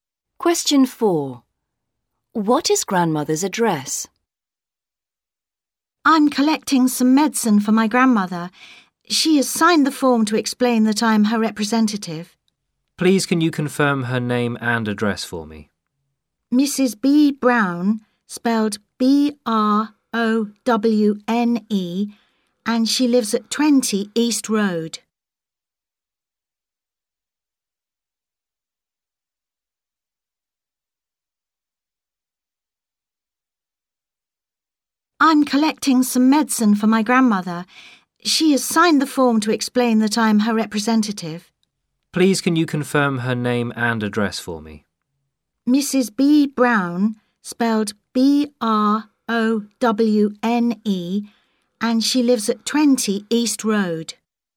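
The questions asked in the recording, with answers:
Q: What is grandmother's address?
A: 20 East Road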